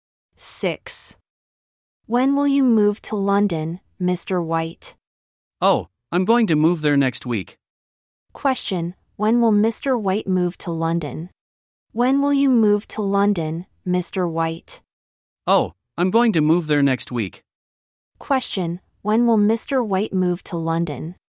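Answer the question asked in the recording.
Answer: Next week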